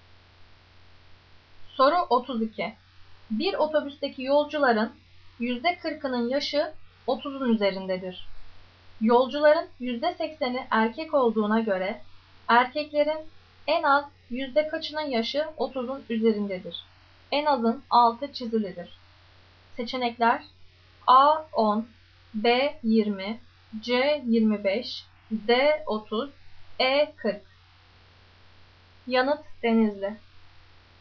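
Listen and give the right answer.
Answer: C: 25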